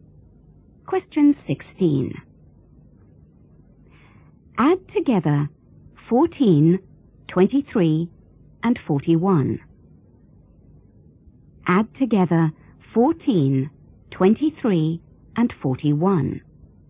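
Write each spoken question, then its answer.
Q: Add together 14, 23, and 41.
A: 78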